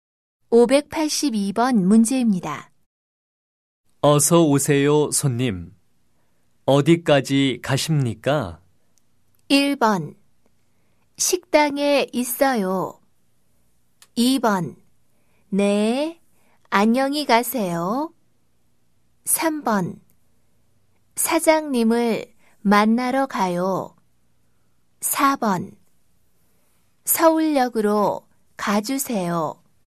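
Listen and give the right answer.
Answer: 4: 서울역으로 가주세요.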